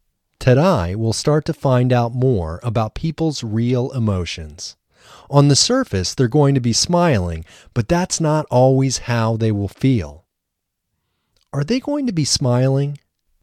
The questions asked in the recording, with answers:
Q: Are they going to be smiling?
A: Yes, they're going to be smiling on the surface.